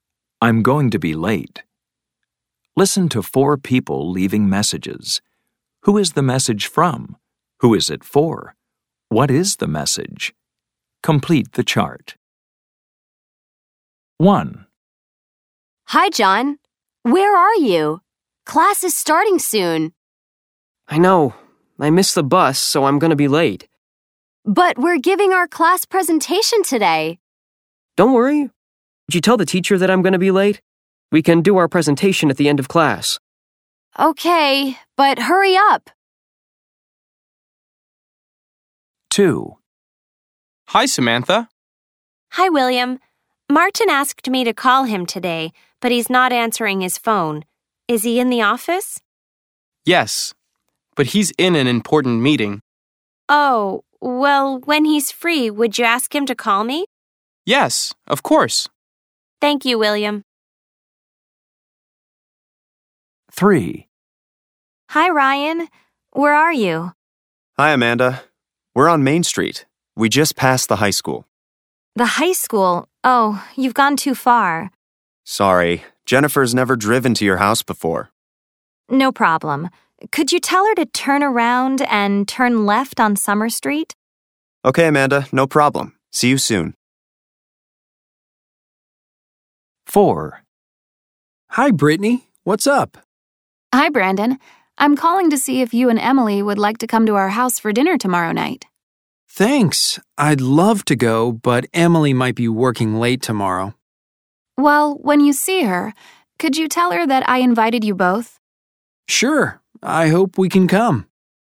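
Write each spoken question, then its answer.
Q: Who is the message from?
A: Samantha

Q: Who is it for?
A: Martin

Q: What is the message?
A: Call Samantha when he's free

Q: Who is the message from?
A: Amanda

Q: Who is it for?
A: Jennifer

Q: What is the message?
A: Turn around and turn left on Summer Street

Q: Who is the message from?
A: Brittany

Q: Who is it for?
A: Emily

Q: What is the message?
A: Brittany invited her and Brandon to dinner tomorrow night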